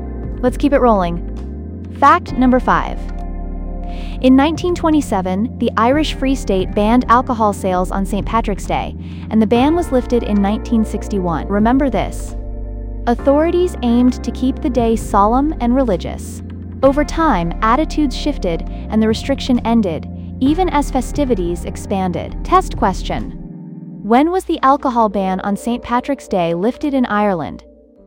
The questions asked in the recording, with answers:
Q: When was the alcohol ban on St. Patrick's Day lifted in Ireland?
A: Correct answer. 1961.